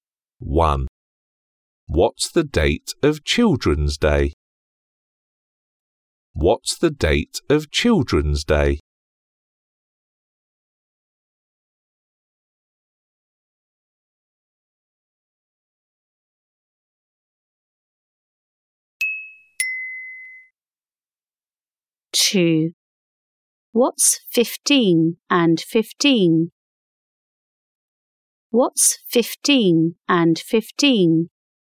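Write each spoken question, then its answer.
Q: What's 15 and 15?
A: 30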